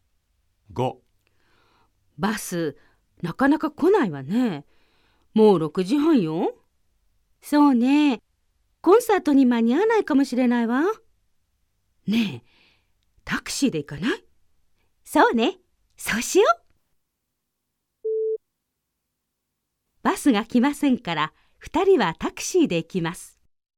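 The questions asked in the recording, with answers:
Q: バスが来ませんから、2人はタクシーで行きます。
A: ○(正しい)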